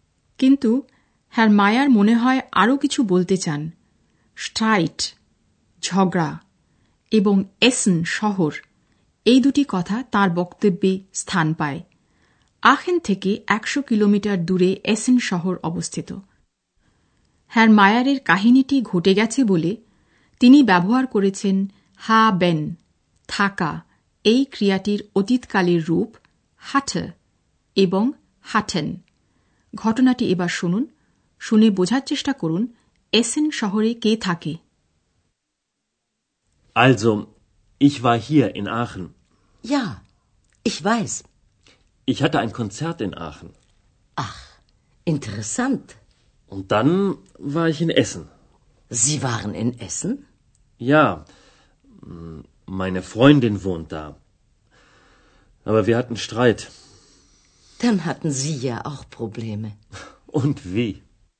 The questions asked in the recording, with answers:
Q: শুনে বোঝার চেষ্টা করুন এসেন শহরে কে থাকে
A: Essen শহরে Herr মায়ারের বান্ধবী